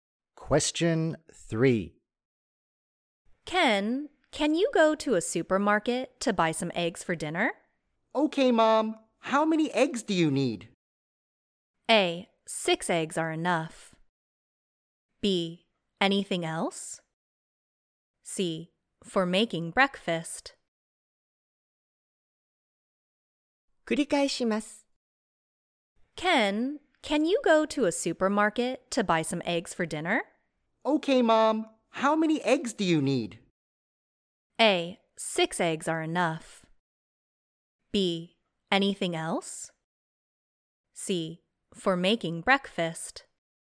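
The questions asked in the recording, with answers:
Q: Okay, Mom. How many eggs do you need?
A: A: 6 eggs are enough.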